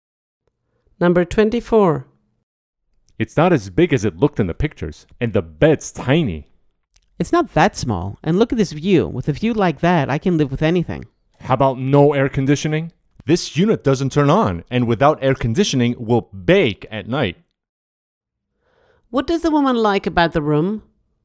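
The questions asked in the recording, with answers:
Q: What does the woman like about the room?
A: The view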